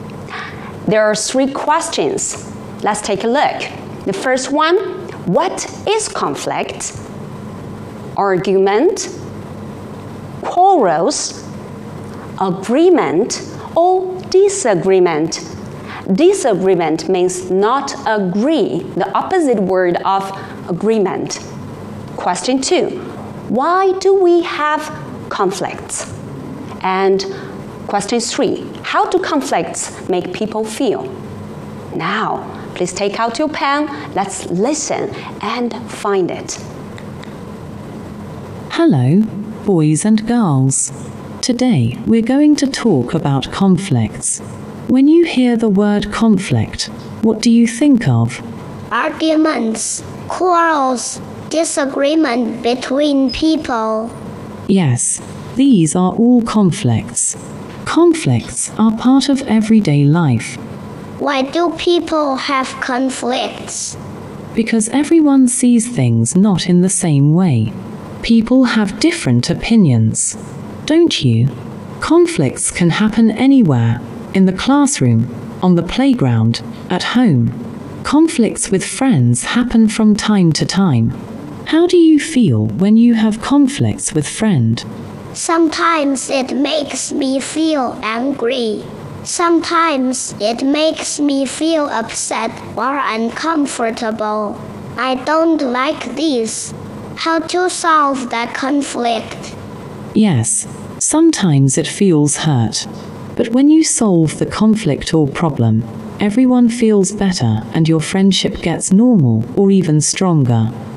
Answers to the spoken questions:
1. Argument? Yes, argument is conflict.
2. Right, because people have different opinions.
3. Yes, it makes us feel angry, upset, uncomfortable means not comfortable, right?